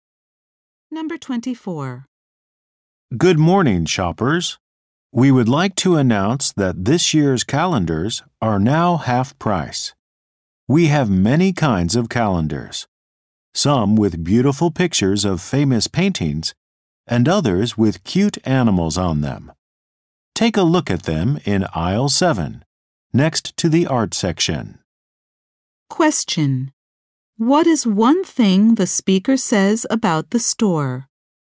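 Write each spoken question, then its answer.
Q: What is one thing the speaker says about the store?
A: This year's calendars are now half price.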